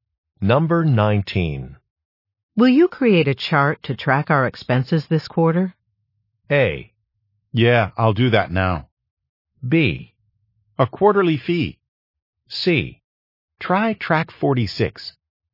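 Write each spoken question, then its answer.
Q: Will you create a chart to track our expenses this quarter?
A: A: Yeah, I'll do that now.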